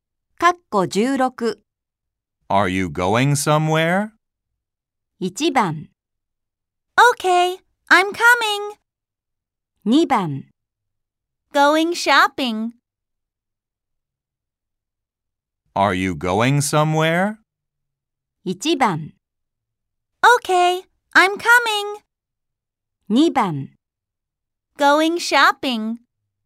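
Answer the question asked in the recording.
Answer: 2: Going shopping.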